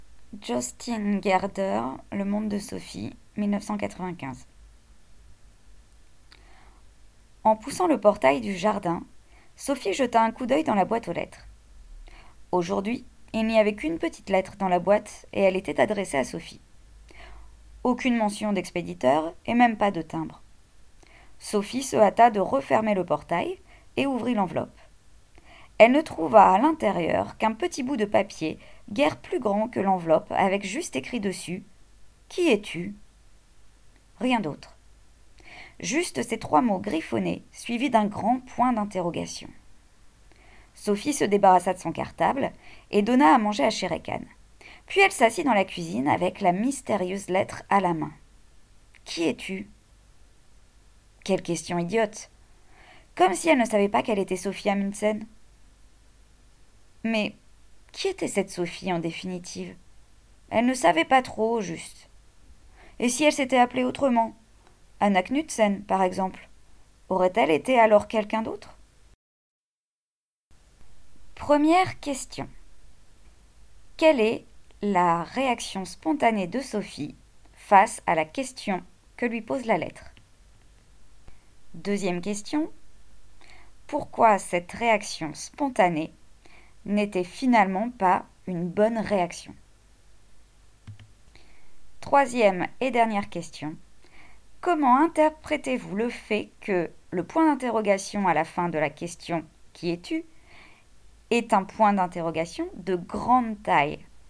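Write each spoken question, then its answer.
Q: Quelle est la réaction spontanée de Sophie face à la question que lui pose la lettre?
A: Elle trouve la question idiote, car elle sait qu'elle est Sophie Amundsen.

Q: Pourquoi cette réaction spontanée n'était finalement pas une bonne réaction.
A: Parce qu'elle ne sait pas vraiment qui est Sophie : si elle s'appelait autrement, serait-elle quelqu'un d'autre ?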